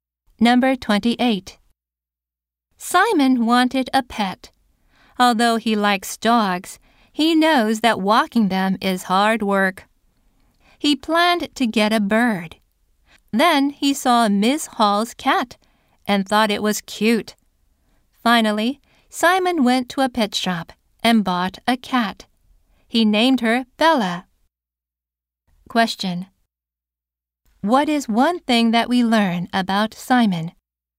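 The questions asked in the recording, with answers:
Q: What is one thing that we learn about Simon?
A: He bought a cat at a pet shop.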